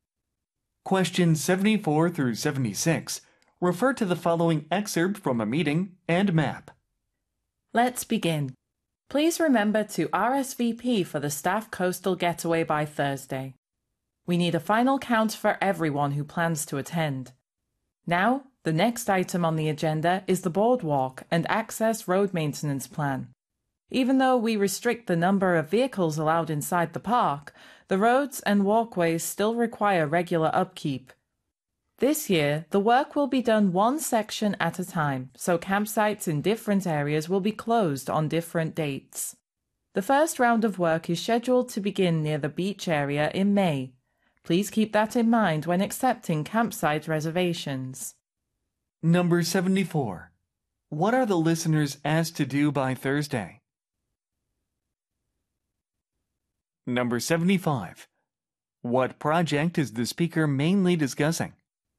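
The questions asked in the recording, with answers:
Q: What are the listeners asked to do by Thursday?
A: RSVP for the staff coastal getaway

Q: What project is the speaker mainly discussing?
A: The boardwalk and access road maintenance plan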